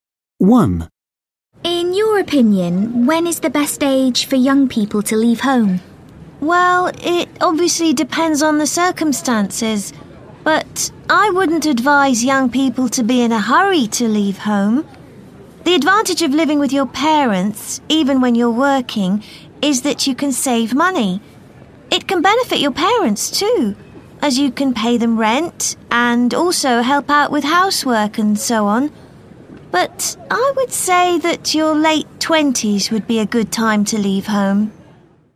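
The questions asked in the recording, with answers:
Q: In your opinion, when is the best age for young people to leave home?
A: In their late 20s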